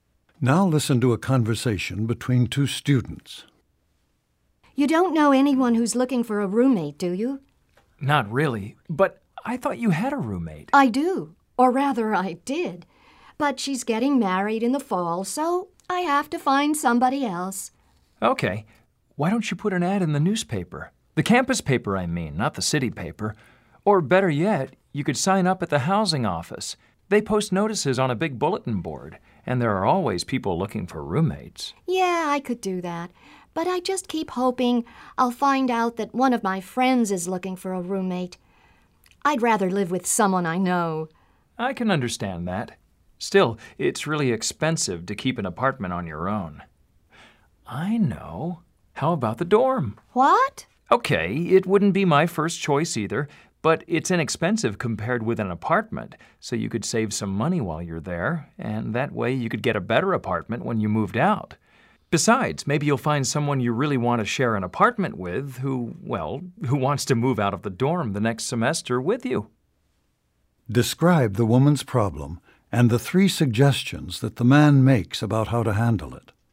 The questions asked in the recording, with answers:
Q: Describe the woman's problem and the three suggestions that the man makes about how to handle it.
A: Because the woman's roommate is getting married in the fall, she has to find another living situation. The man offers several suggestions. He mentions putting an ad in the school newspaper and posting a sign in the housing office. He also suggests that she could move into the dormitory to save money until she finds another roommate.